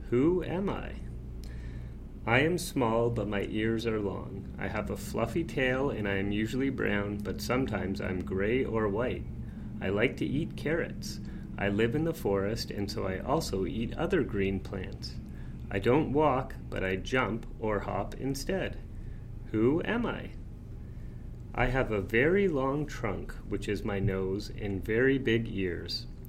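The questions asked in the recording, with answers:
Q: Who am I?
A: a rabbit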